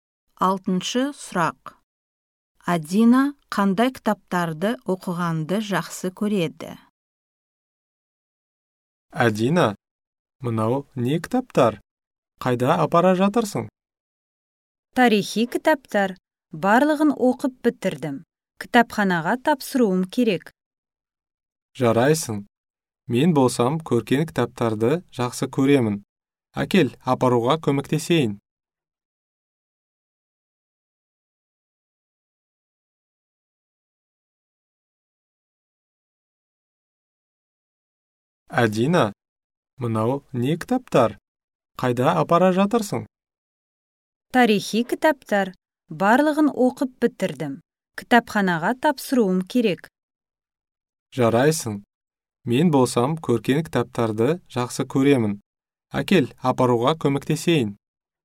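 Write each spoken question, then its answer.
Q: Адина қандай кітаптарды оқығанды жақсы көреді?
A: Тарихи кітаптар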